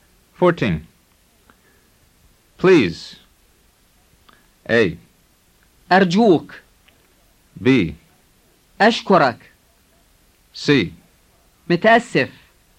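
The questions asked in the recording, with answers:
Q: Please.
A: A: أرجوك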